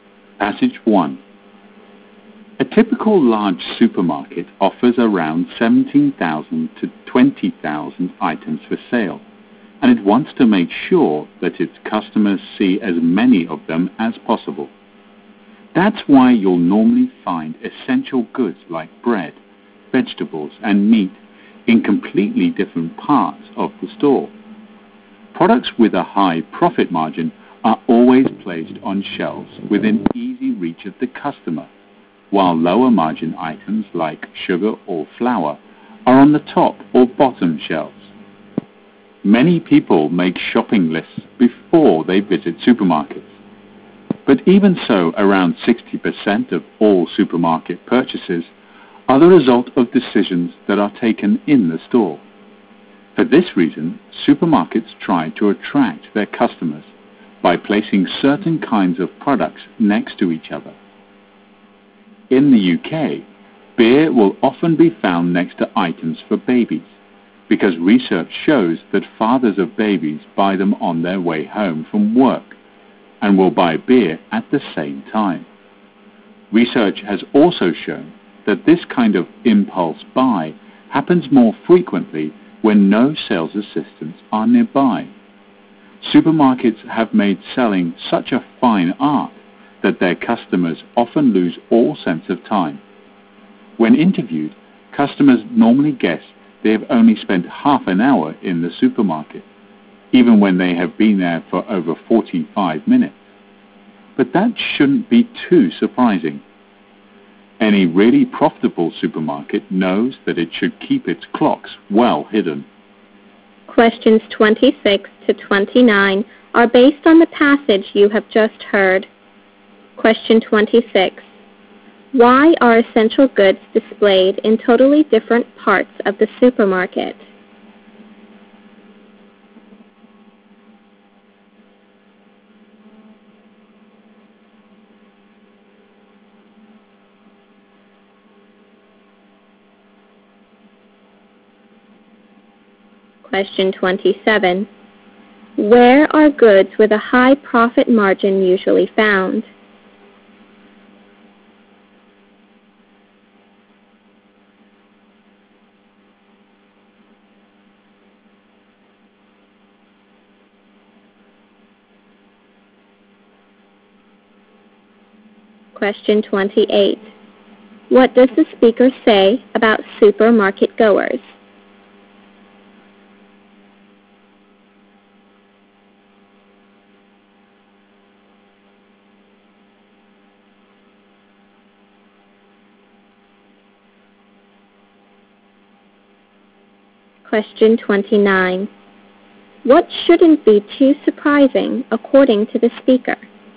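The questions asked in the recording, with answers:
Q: Why are essential goods displayed in totally different parts of the supermarket?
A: So that customers see as many items as possible.

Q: Where are goods with a high profit margin usually found?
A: On shelves within easy reach of the customer.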